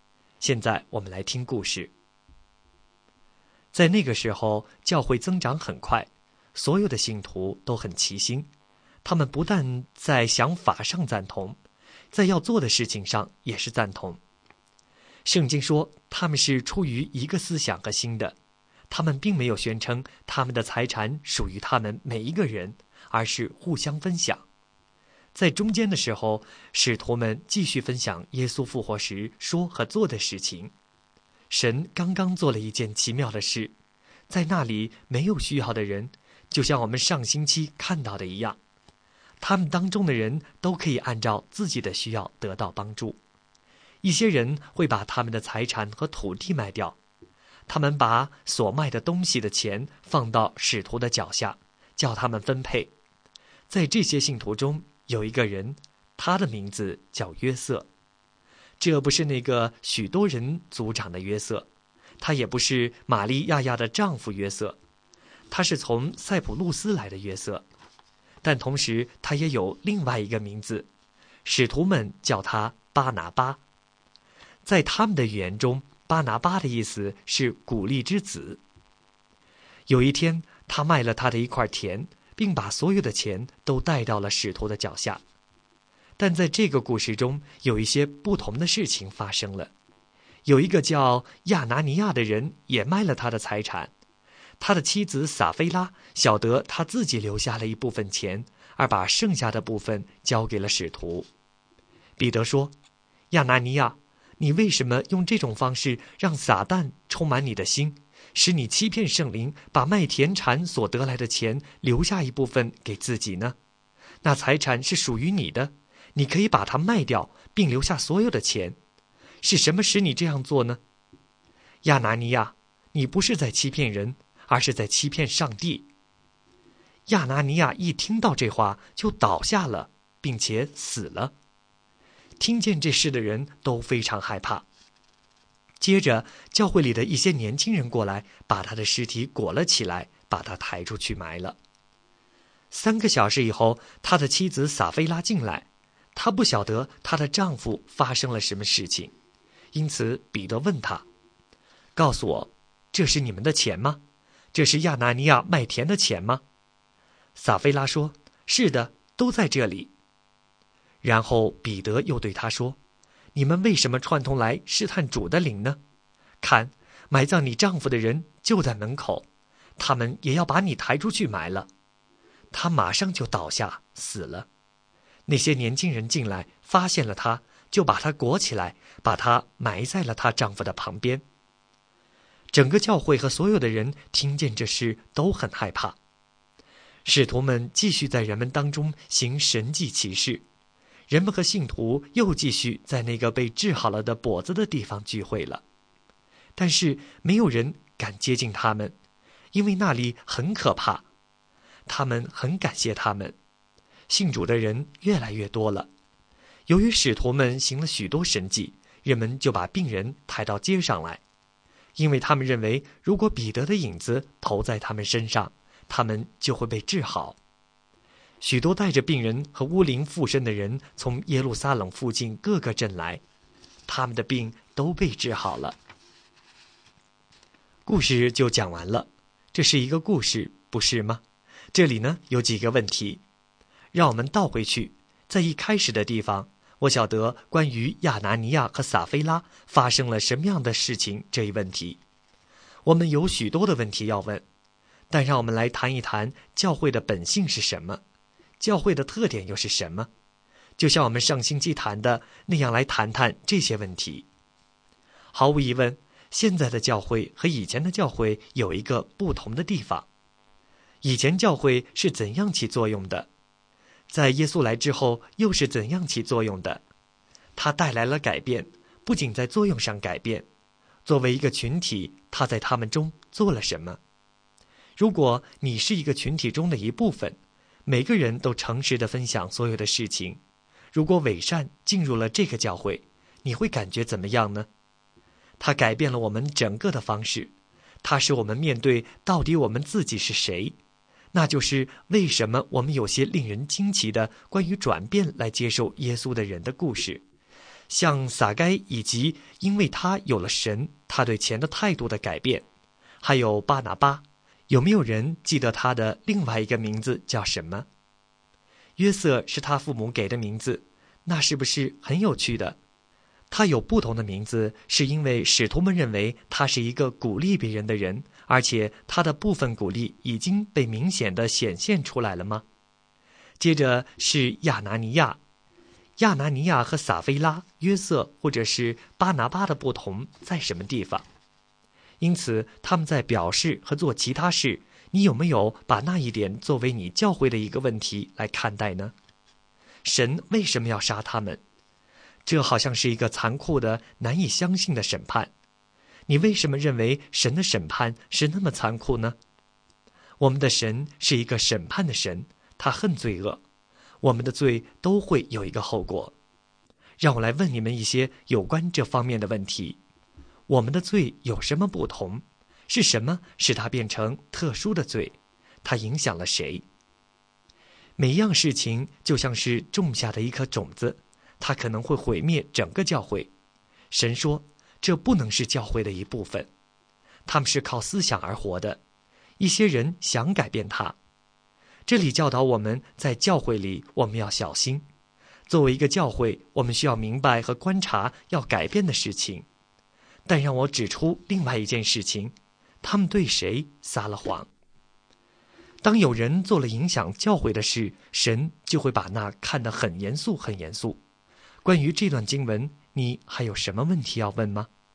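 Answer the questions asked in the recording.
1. 巴拿巴(鼓励之子)
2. 对神(圣灵)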